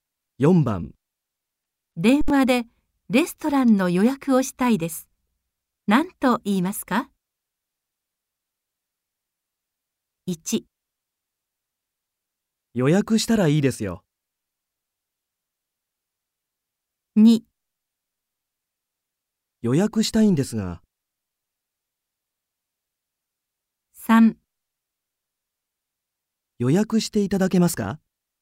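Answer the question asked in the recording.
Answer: 2: 予約したいんですが。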